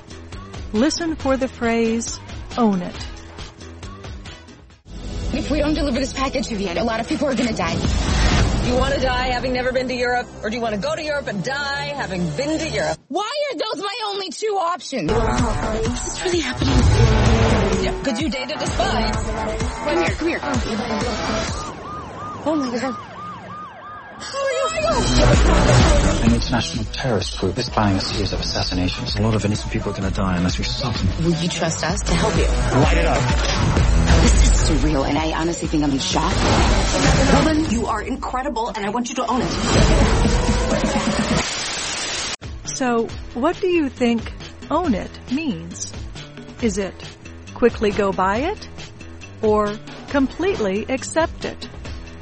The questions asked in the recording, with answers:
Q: So, what do you think own it means?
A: Own it means completely accept it.